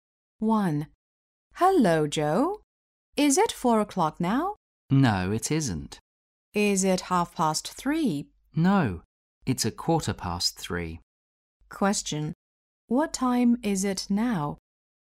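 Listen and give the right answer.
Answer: 3:15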